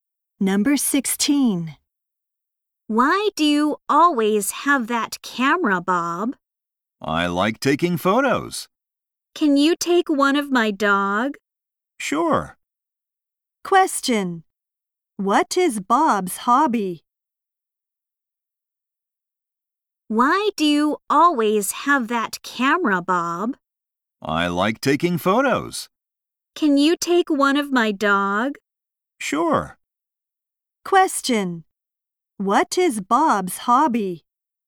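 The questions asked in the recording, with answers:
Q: What is Bob's hobby?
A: Taking photos.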